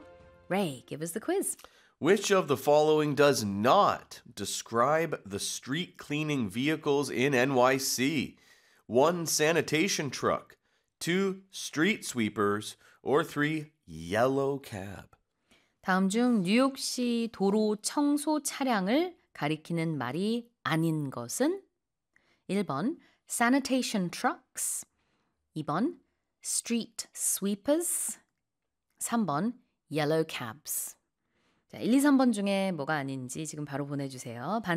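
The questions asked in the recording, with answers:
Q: Which of the following does not describe the street cleaning vehicles in NYC?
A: 3: yellow cab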